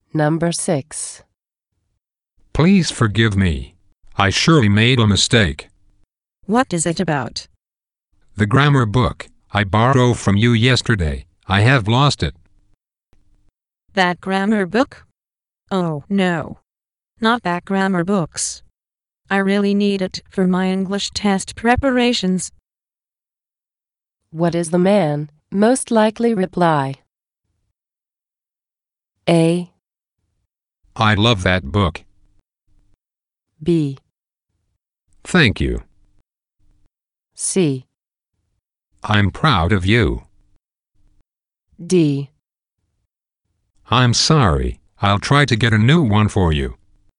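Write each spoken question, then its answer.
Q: What is the man most likely reply?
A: D: I'm sorry, I'll try to get a new one for you.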